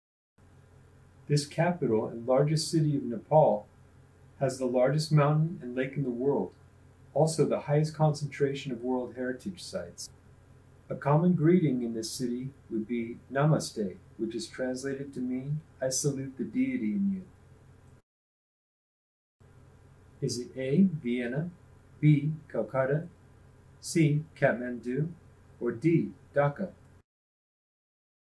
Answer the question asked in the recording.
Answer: If you chose Kathmandu, you're correct.